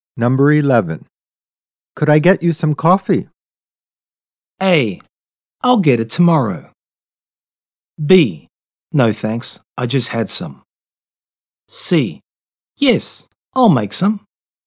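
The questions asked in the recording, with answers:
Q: Could I get you some coffee?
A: B: No thanks, I just had some.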